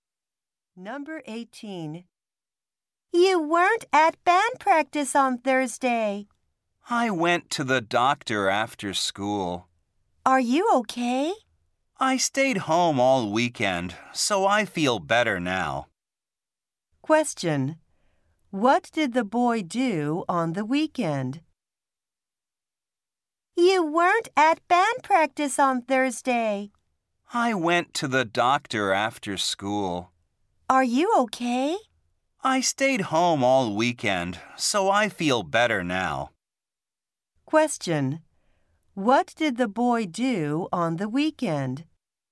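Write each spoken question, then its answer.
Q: What did the boy do on the weekend?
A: He stayed home.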